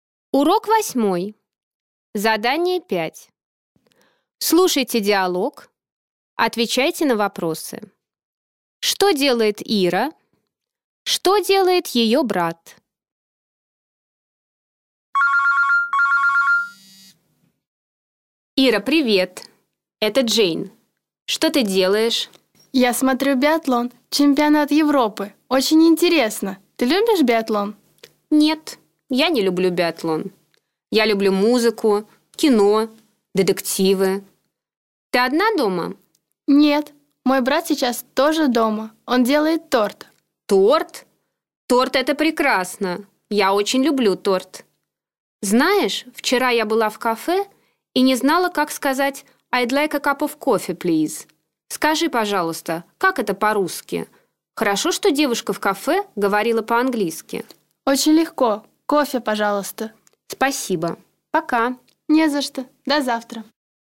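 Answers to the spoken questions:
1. Смотрит биатлон, чемпионат Европы
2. Делает торт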